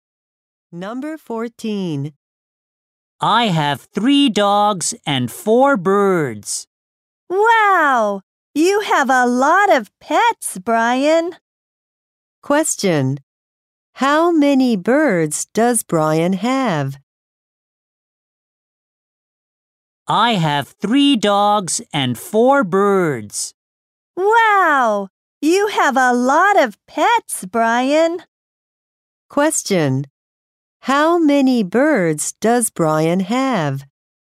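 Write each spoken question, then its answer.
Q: How many birds does Brian have?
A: Four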